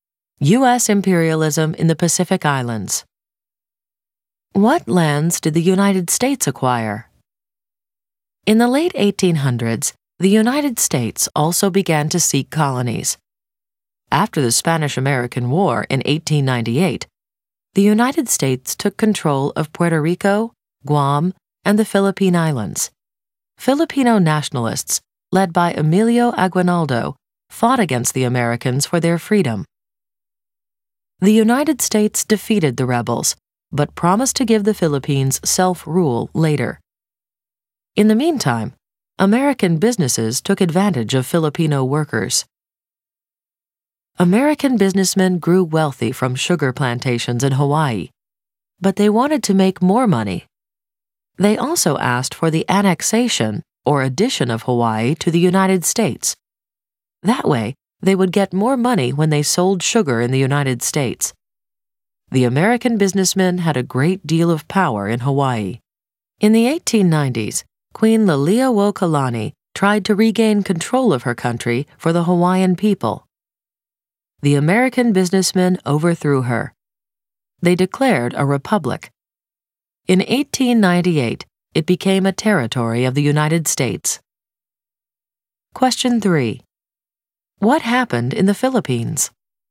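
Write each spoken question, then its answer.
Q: What happened in the Philippines?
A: The US took control after 1898, defeated Aguinaldo's nationalists, promised later self-rule; American businesses exploited Filipino workers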